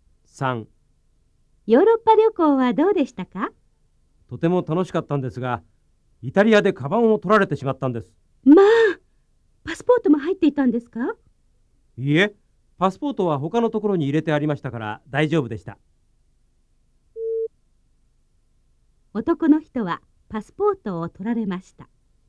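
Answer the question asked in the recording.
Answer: ×(間違い)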